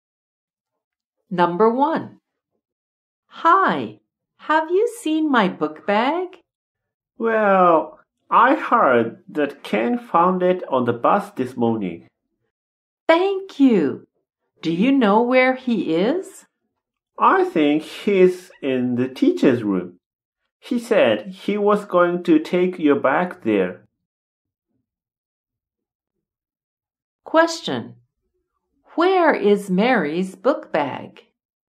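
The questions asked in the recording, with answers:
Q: Where is Mary's book bag?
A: In the teacher's room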